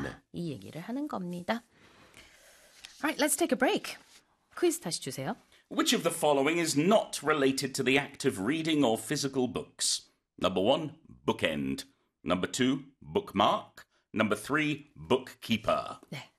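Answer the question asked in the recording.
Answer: 3: bookkeeper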